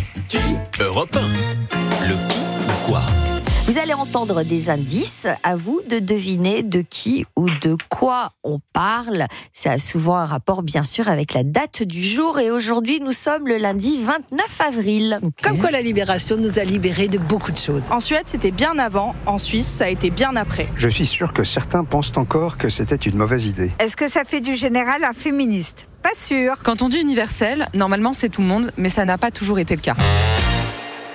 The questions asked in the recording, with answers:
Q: Vous allez entendre des indices, à vous de deviner de qui ou de quoi on parle.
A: Le vote des femmes, effectivement, c'était en 1945.